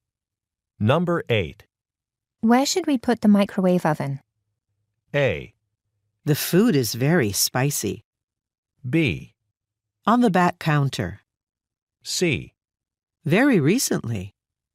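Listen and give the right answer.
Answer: B: On the back counter.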